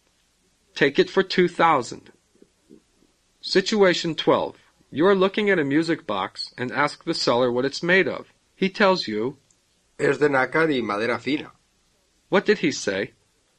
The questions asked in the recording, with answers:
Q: What did he say?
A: It is made out of mother of pearl and fine quality wood.